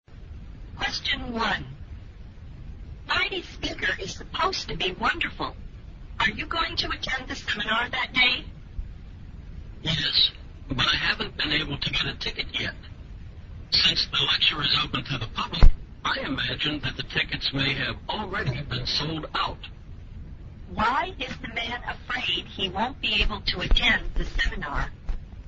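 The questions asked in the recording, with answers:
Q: Why is the man afraid he won't be able to attend the seminar?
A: The tickets may already be sold out.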